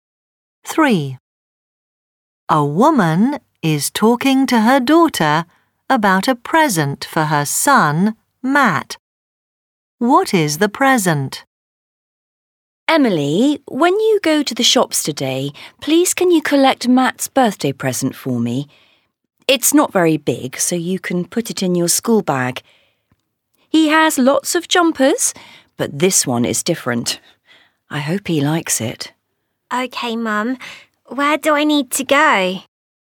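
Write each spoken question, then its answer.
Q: What is the present?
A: A jumper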